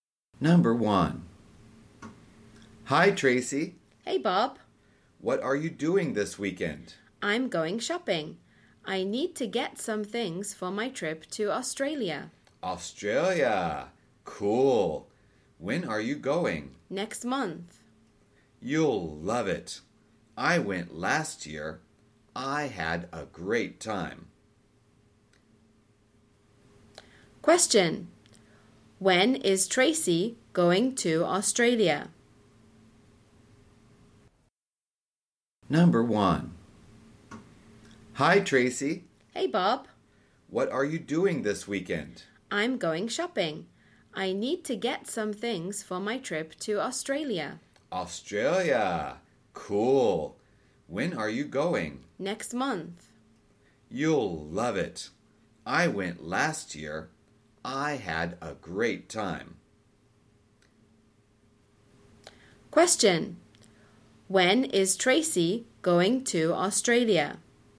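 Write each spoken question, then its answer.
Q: When is Tracy going to Australia?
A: Next month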